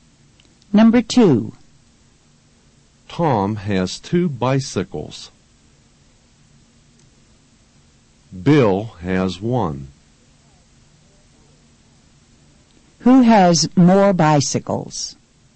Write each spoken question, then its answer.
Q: Who has more bicycles?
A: Tom has more bicycles than Bill.